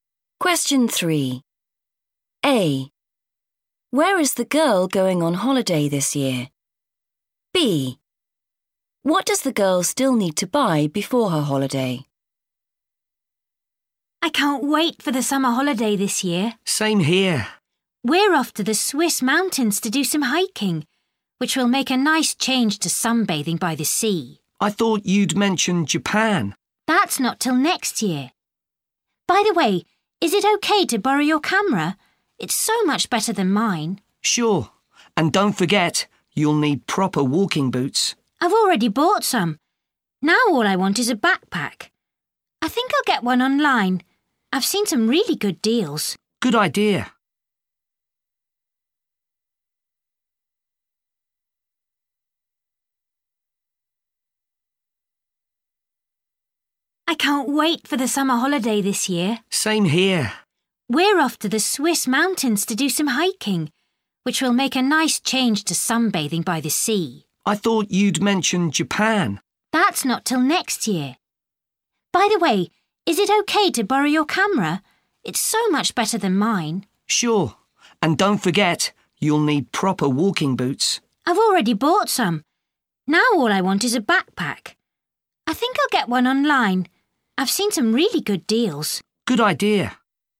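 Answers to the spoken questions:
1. the Swiss mountains
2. a backpack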